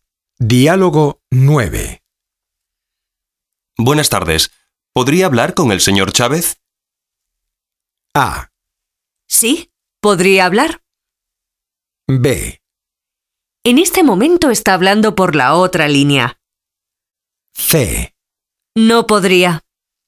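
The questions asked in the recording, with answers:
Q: Buenas tardes. ¿Podría hablar con el señor Chávez?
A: B: En este momento está hablando por la otra línea.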